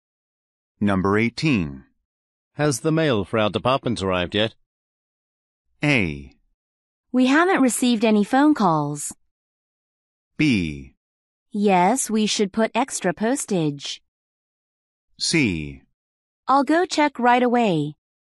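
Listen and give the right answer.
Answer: C: I'll go check right away.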